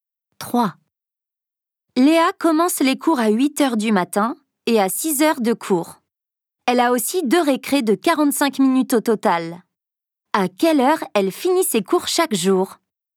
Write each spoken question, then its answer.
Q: À quelle heure elle finit ses cours chaque jour ?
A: 14h45.